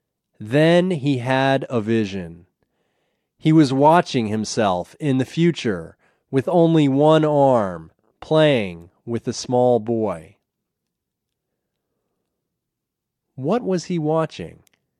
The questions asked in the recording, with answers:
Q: What was he watching?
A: He was watching himself in the future with only one arm playing with a small boy.